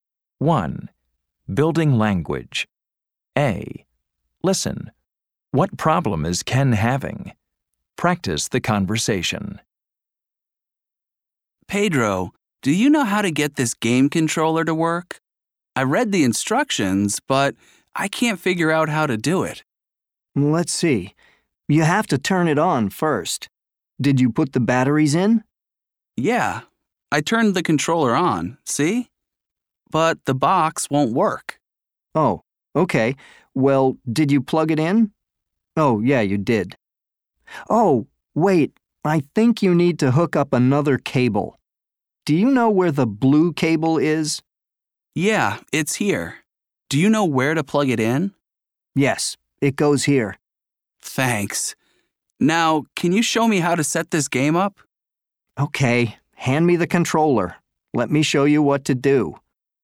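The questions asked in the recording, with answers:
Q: What problem is Ken having?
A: He can't get his game controller/game box to work.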